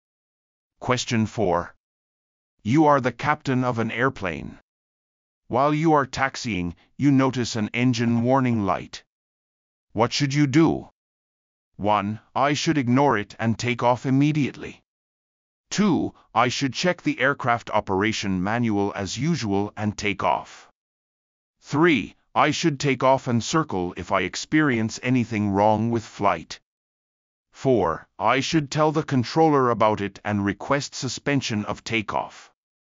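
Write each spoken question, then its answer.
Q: What should you do?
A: 4: I should tell the controller about it and request suspension of takeoff.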